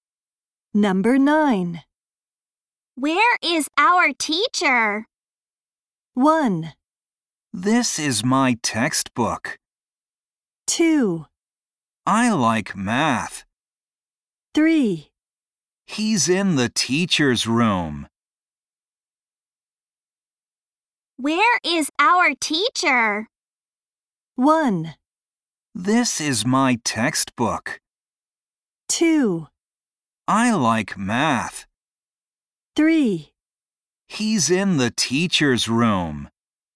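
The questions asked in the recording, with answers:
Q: Where is our teacher?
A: 3: He's in the teacher's room.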